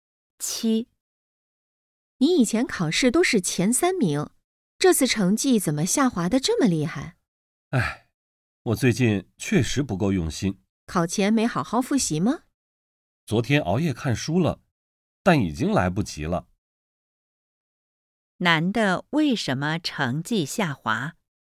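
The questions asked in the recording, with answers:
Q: 男的为什么成绩下滑?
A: 最近不够用心,考前没好好复习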